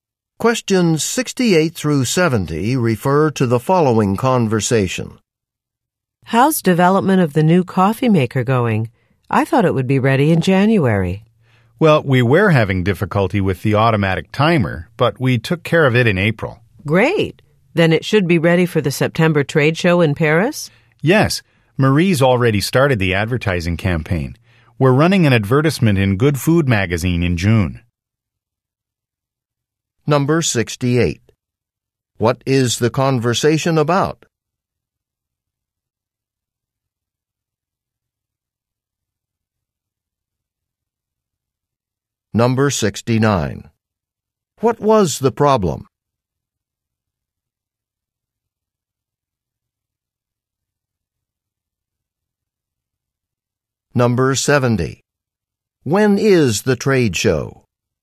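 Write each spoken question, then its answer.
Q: What is the conversation about?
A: Developing a new coffee maker

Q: What was the problem?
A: The automatic timer

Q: When is the trade show?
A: In September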